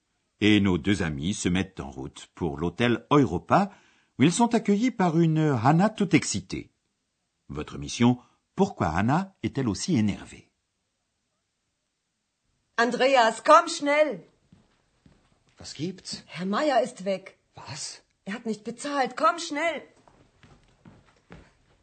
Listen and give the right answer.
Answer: Sans doute avez-vous compris que Hannah est énervée parce que M.